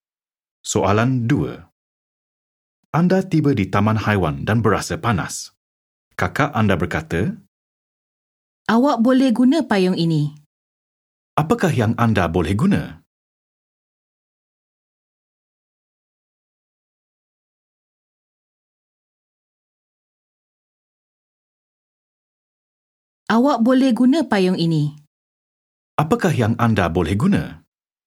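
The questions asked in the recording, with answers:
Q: Apakah yang anda boleh guna?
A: Payung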